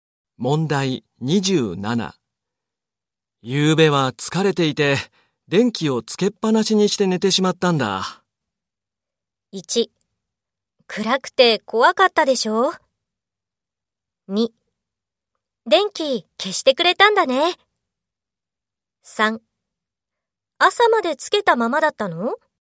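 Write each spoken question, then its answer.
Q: 夕べは疲れていて、電気をつけっぱなしにして寝てしまったんだ。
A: 1: 朝までつけたままだったの?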